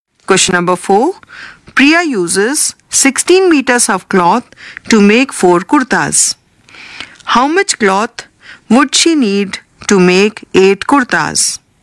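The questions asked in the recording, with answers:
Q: How much cloth would she need to make 8 kurtas?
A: 32 meters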